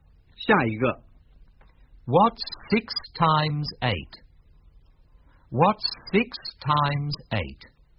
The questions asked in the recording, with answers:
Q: What's 6 times 8?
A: 48.